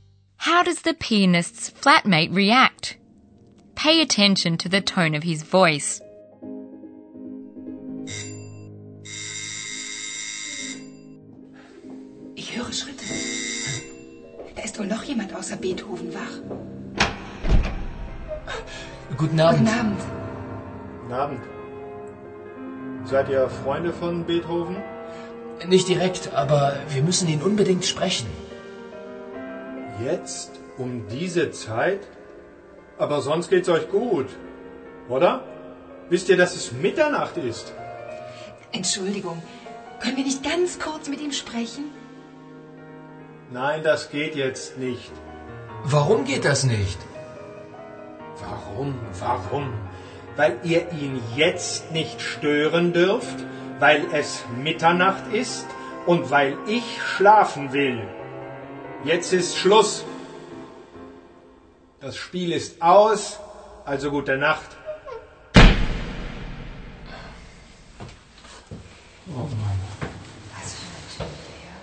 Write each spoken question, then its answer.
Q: How does the pianist's flatmate react?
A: Were you able to hear how the flatmate gradually gets angrier and angrier?